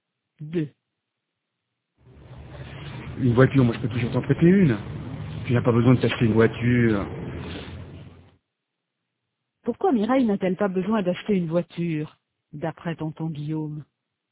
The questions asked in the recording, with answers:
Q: Pourquoi Mireille n'a-t-elle pas besoin d'acheter une voiture, d'après tonton Guillaume?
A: Parce qu'il peut toujours lui en prêter une.